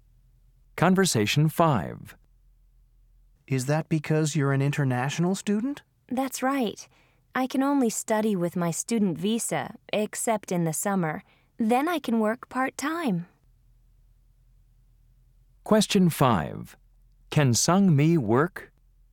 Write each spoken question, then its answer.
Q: Can Sangmi work?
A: So you can work only in the summer?